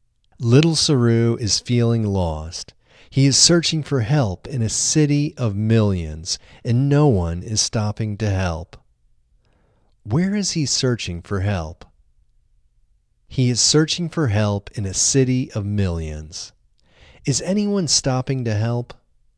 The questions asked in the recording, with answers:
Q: Where is he searching for help?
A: He is searching for help in a city of millions.

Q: Is anyone stopping to help?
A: No, no one is stopping to help.